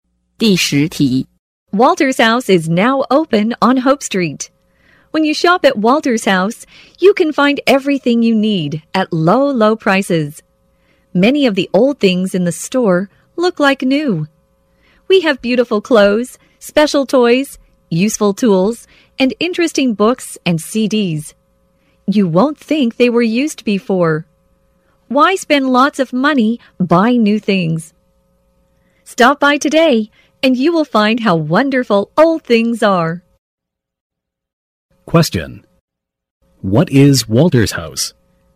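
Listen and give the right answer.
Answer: A secondhand store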